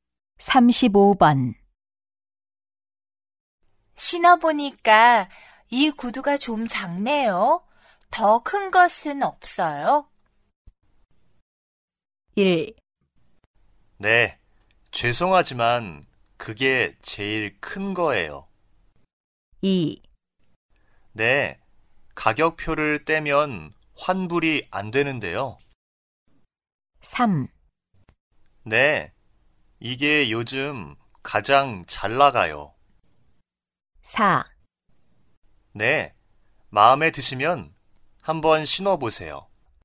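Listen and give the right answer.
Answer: 1: 네, 죄송하지만 그게 제일 큰 거예요.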